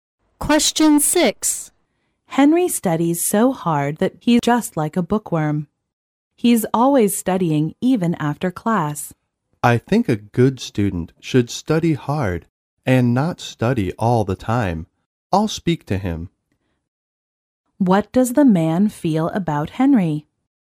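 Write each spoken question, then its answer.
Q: What does the man feel about Henry?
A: Henry studies too much; he shouldn't study all the time.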